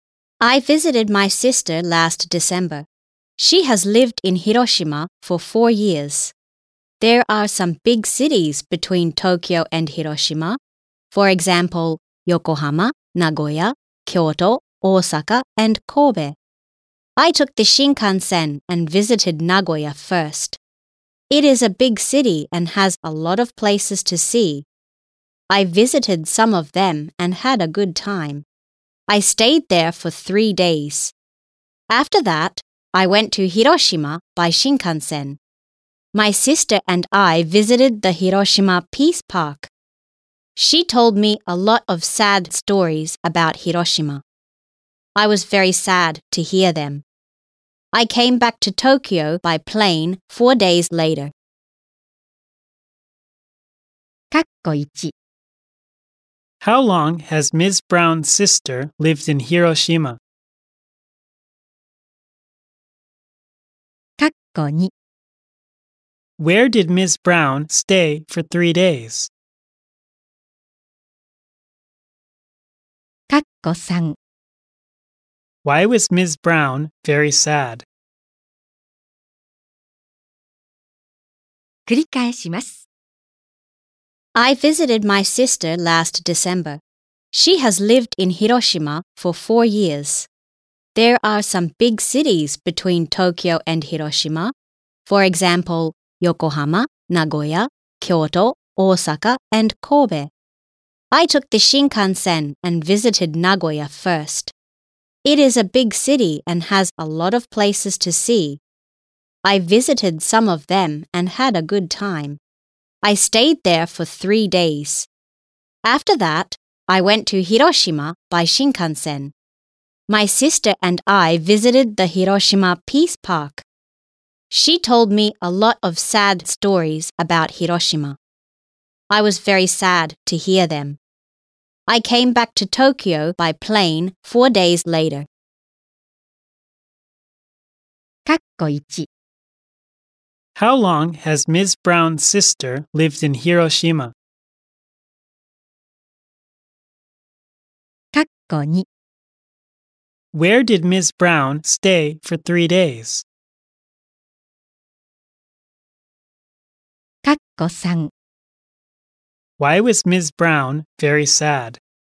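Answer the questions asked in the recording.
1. For four years
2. In Nagoya
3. Because she heard sad stories about Hiroshima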